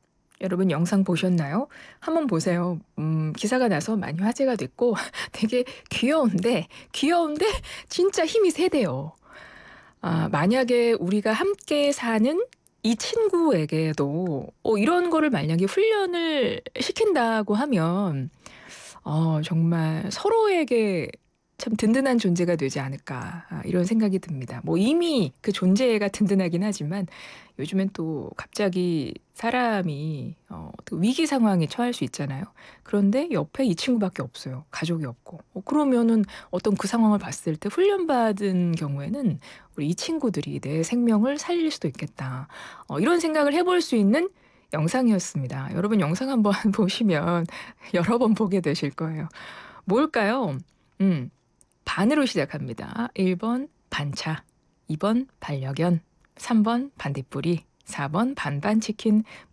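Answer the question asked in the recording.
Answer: 2: 반려견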